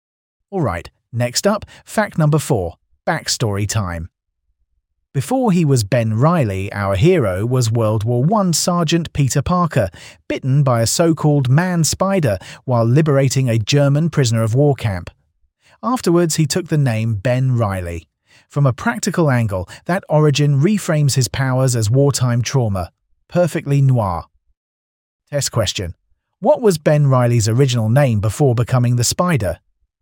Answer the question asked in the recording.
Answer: Peter Parker.